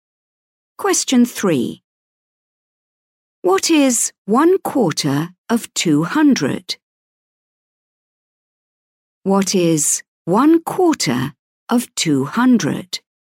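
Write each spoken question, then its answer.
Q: What is 1/4 of 200?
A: 50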